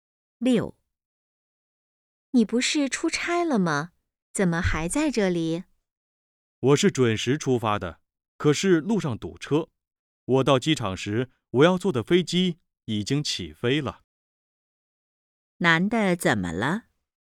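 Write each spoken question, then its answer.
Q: 男的怎么了?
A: 没赶上飞机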